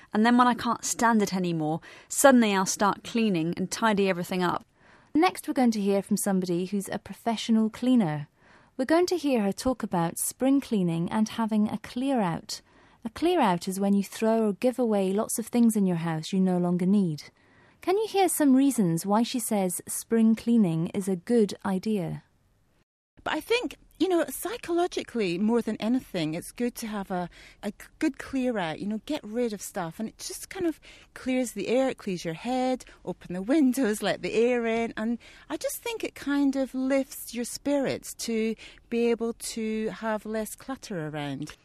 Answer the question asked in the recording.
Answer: She said that spring cleaning clears the air and your head.